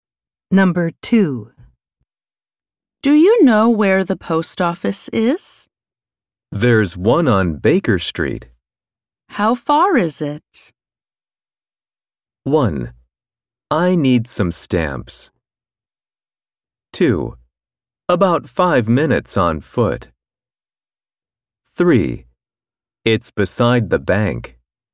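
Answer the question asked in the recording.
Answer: 2: About five minutes on foot.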